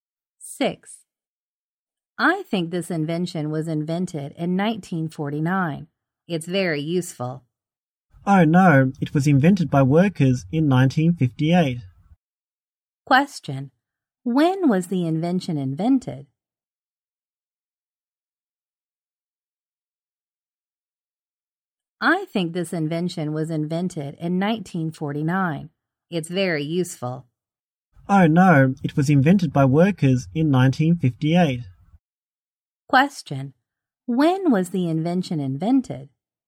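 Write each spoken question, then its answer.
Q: When was the invention invented?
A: In 1958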